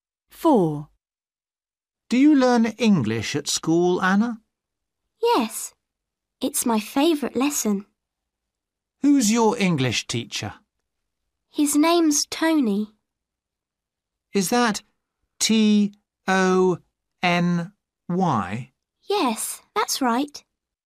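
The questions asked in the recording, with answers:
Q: Who's your English teacher?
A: Tony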